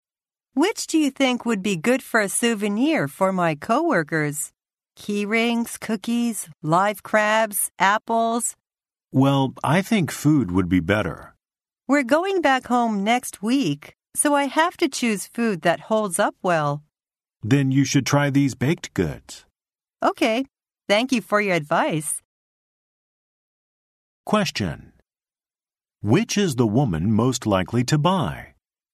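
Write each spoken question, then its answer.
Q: Which is the woman most likely to buy?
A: Cookies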